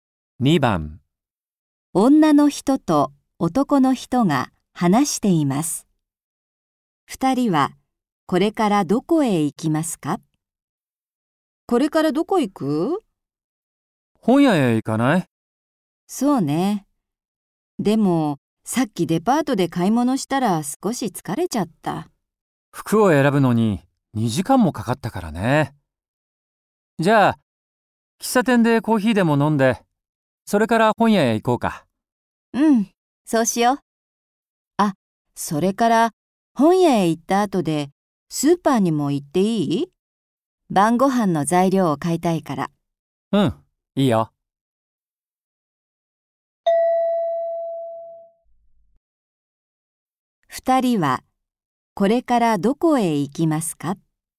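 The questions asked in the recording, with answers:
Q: 二人はこれからどこへ行きますか?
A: 喫茶店、それから本屋、その後スーパー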